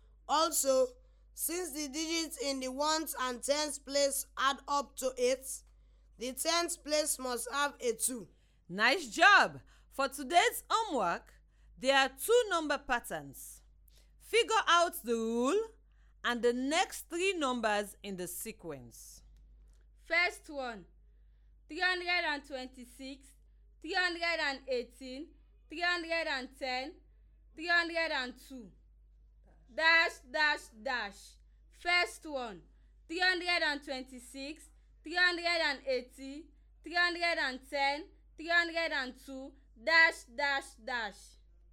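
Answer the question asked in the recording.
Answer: 294, 286, 278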